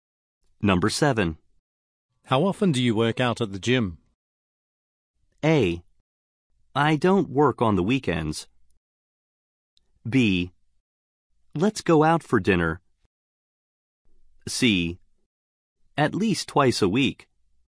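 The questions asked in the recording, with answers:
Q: How often do you work out at the gym?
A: C: At least twice a week.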